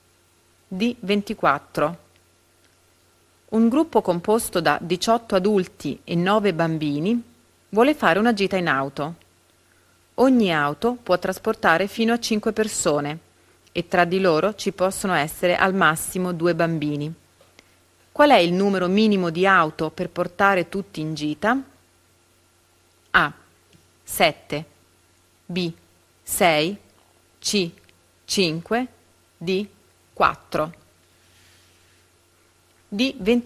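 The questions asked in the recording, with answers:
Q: Qual è il numero minimo di auto per portare tutti in gita?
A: B: 6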